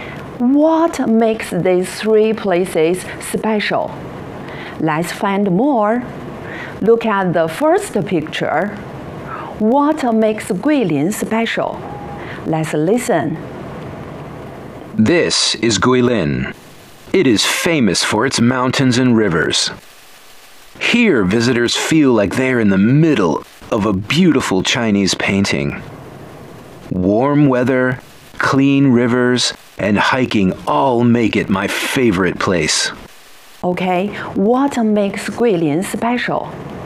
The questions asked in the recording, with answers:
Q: Okay, what makes Guilin special?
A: It is famous for its mountains and rivers.